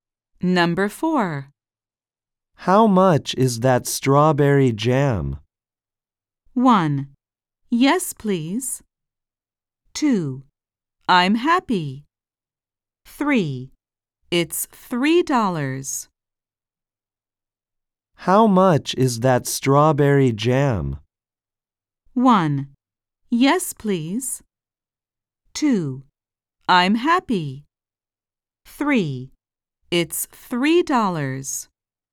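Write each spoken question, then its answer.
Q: How much is that strawberry jam?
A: 3: It's $3.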